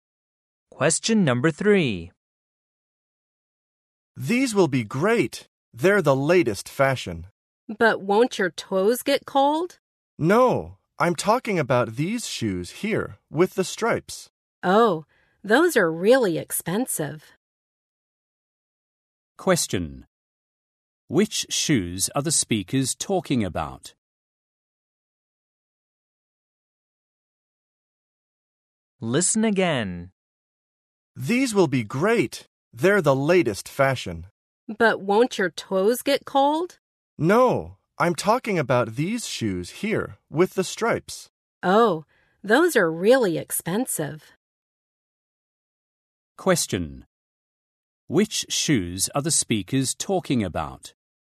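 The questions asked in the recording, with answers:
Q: Which shoes are the speakers talking about?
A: The expensive striped shoes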